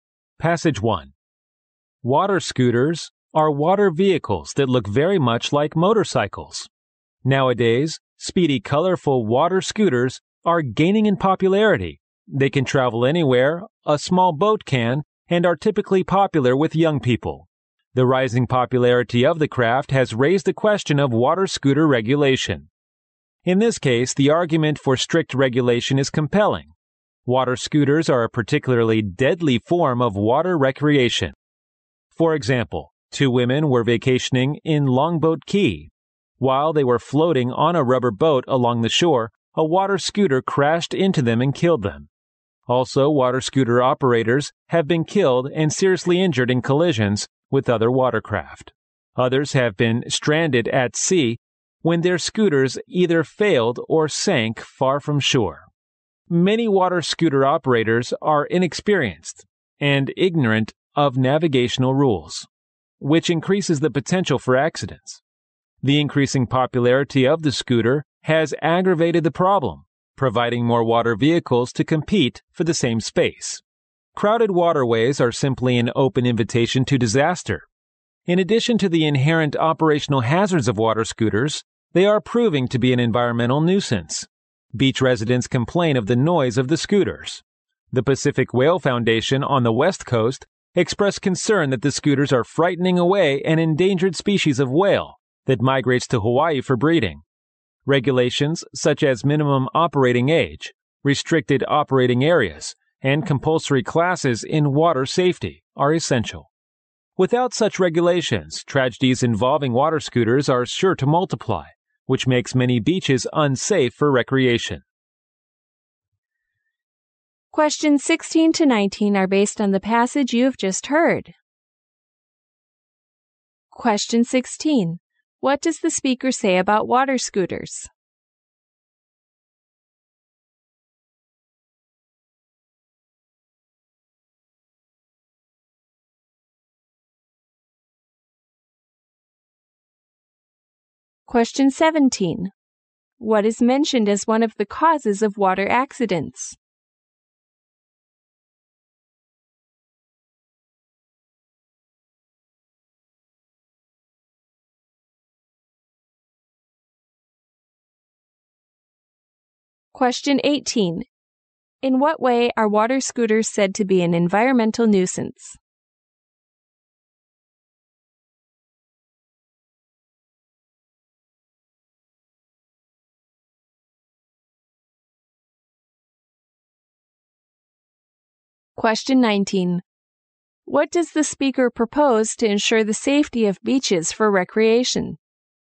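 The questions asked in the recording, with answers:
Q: What does the speaker say about water scooters?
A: They are dangerous and should be strictly regulated.

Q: What is mentioned as one of the causes of water accidents?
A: Operators who are inexperienced and don't know the navigation rules.

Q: In what way are water scooters said to be an environmental nuisance?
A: They are noisy and frighten away endangered whales.

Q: What does the speaker propose to ensure the safety of beaches for recreation?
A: Regulations such as a minimum operating age, restricted areas and compulsory water safety classes.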